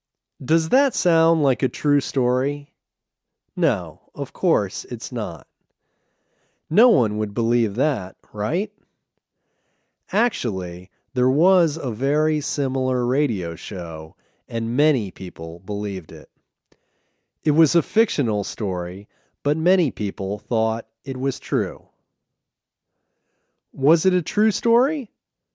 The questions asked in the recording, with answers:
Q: Was it a true story?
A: No, it wasn't a true story.